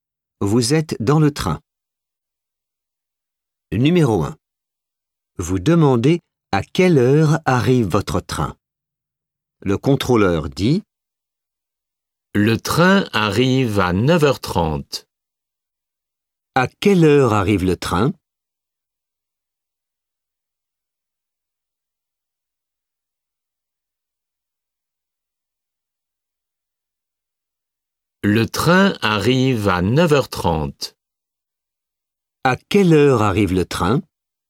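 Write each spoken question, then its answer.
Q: À quelle heure arrive le train ?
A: À 9h30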